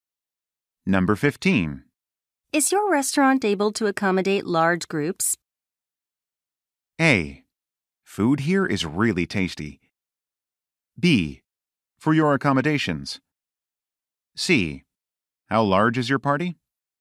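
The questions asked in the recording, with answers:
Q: Is your restaurant able to accommodate large groups?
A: C: How large is your party?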